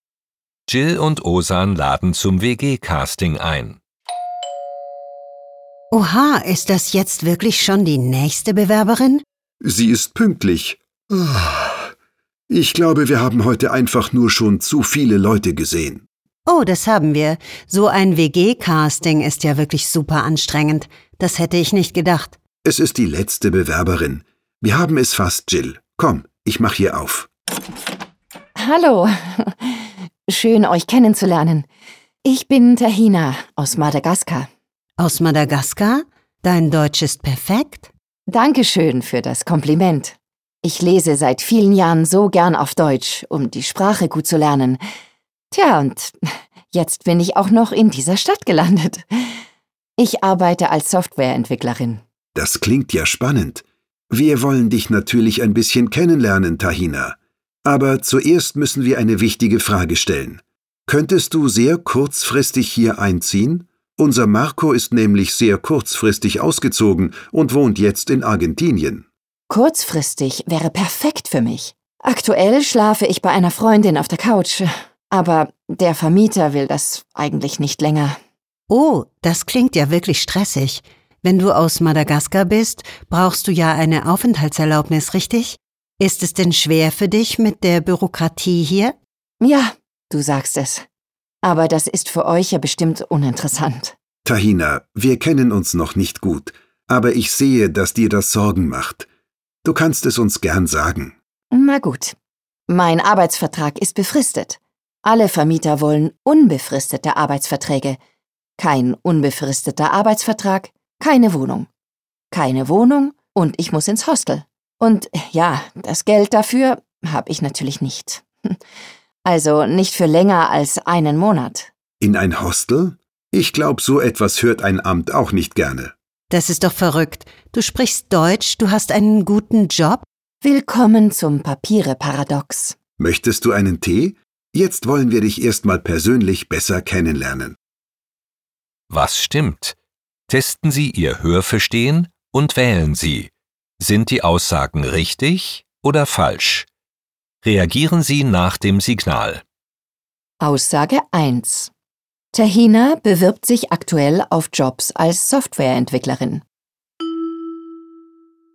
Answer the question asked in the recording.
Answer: Falsch. Sie arbeitet schon als Softwareentwicklerin.